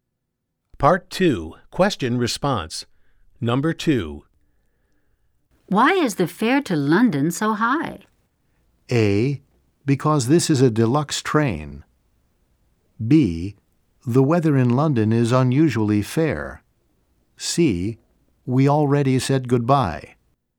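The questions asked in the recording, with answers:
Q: Why is the fare to London so high?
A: A: Because this is a deluxe train.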